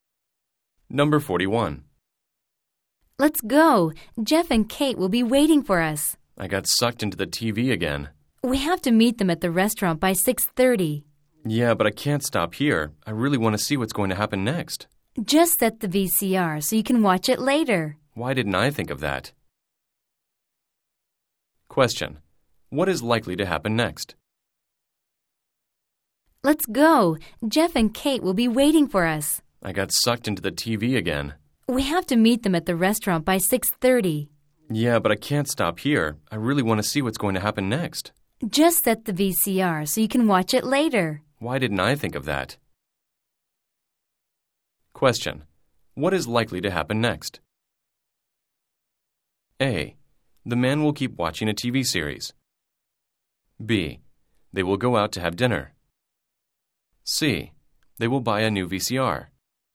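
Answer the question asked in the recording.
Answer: B: They will go out to have dinner.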